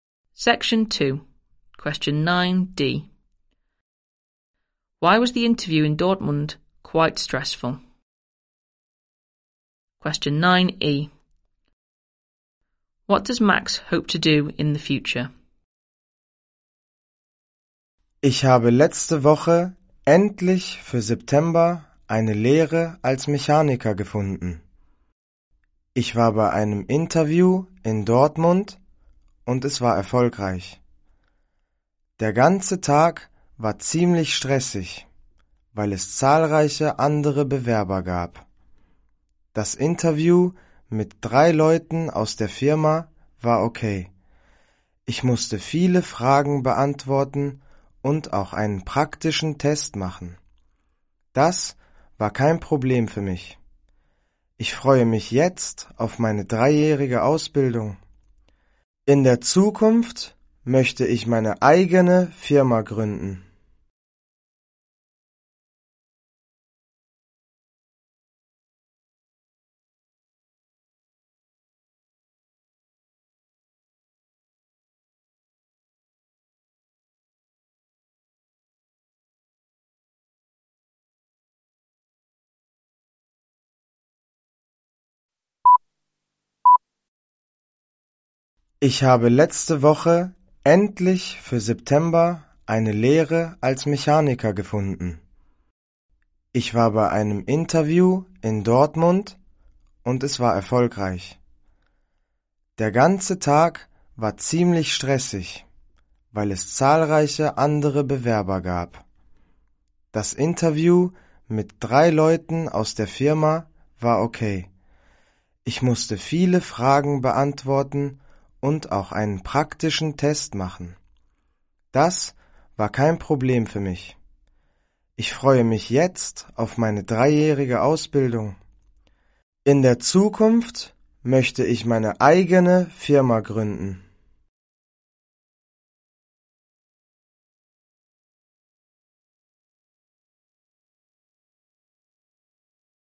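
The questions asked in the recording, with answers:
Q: Why was the interview in Dortmund quite stressful?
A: There were many other applicants

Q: What does Max hope to do in the future?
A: Set up his own company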